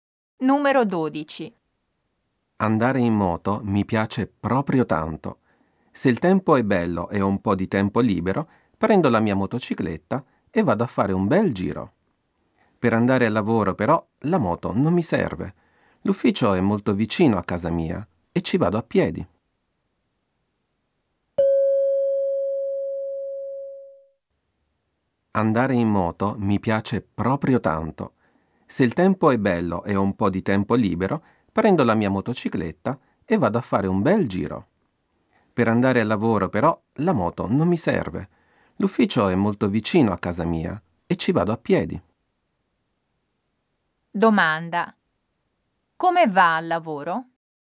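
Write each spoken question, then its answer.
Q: Come va al lavoro?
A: A piedi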